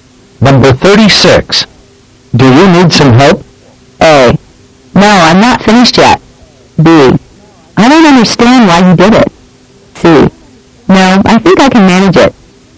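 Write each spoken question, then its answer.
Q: Do you need some help?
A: C: No, I think I can manage it.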